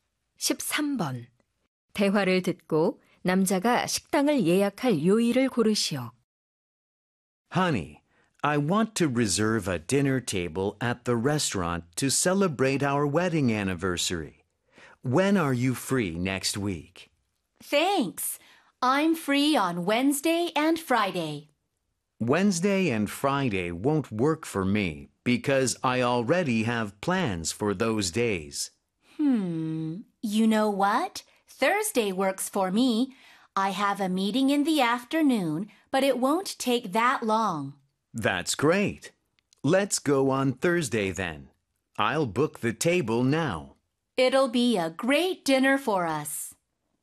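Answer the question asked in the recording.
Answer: 목요일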